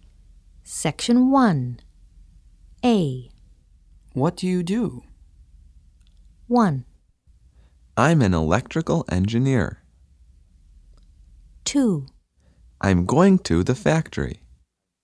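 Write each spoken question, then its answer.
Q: What do you do?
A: 1: I'm an electrical engineer.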